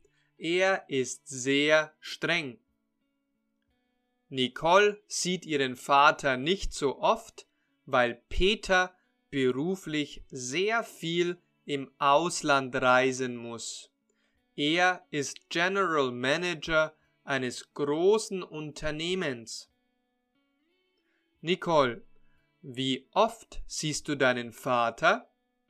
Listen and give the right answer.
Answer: Ich sehe ihn leider nicht so oft, weil er beruflich sehr viel im Ausland reisen muss.